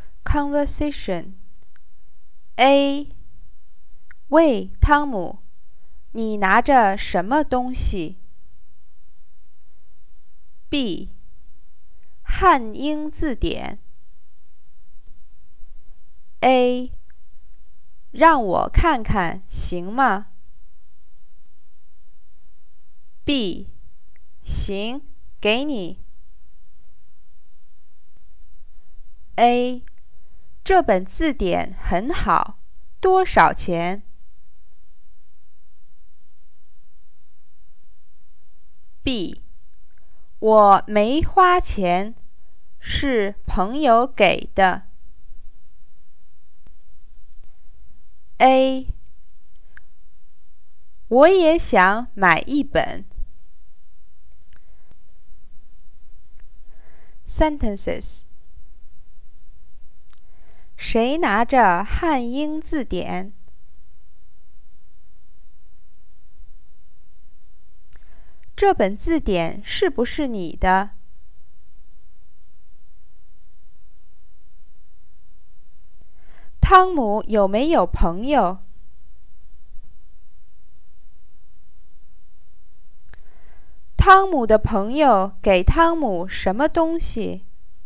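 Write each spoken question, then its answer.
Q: 谁拿着汉英字典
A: 汤姆

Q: 汤姆的朋友给汤姆什么东西?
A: 汉英字典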